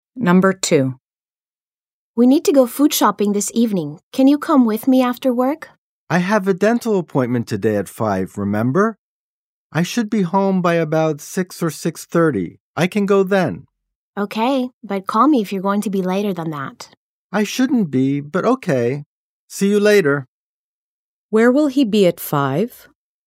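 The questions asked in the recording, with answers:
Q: Where will he be at 5?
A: At the dentist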